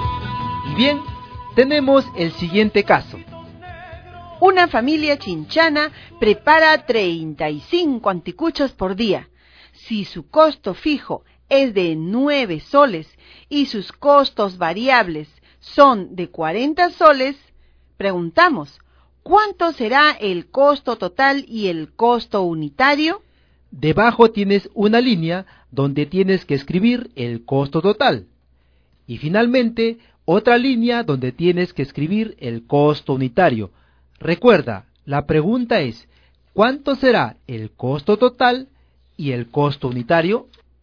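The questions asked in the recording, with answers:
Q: ¿cuánto será el costo total y el costo unitario?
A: Costo total 49 soles; costo unitario 1,40 soles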